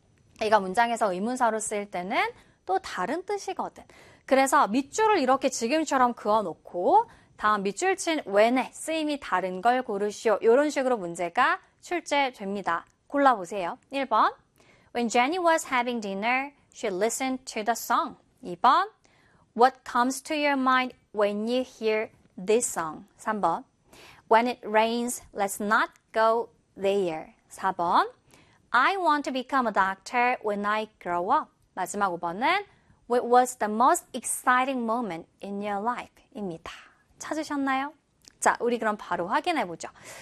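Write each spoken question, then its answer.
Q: 다음 밑줄 친 when에 쓰임이 다른 걸 고르시오.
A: 5번: What was the most exciting moment in your life?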